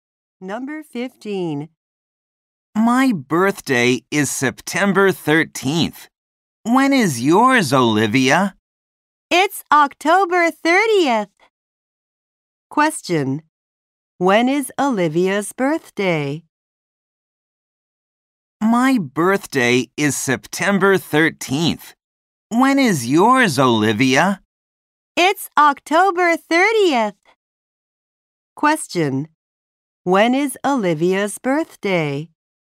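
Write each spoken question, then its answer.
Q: When is Olivia's birthday?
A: October 30th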